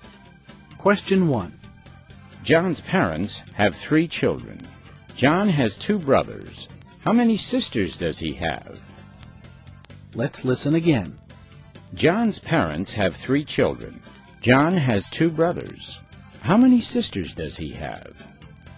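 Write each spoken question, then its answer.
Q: How many sisters does he have?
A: None (zero)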